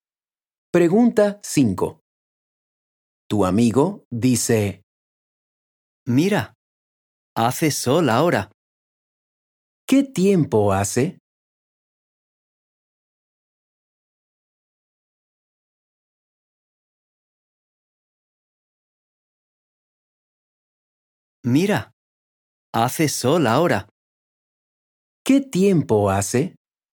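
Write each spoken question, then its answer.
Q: ¿Qué tiempo hace?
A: hace sol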